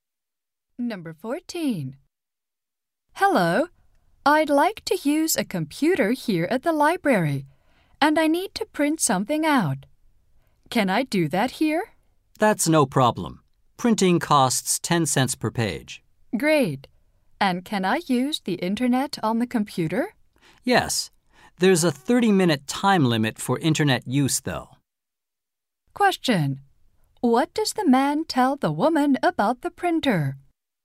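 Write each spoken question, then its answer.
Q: What does the man tell the woman about the printer?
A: Printing costs 10 cents per page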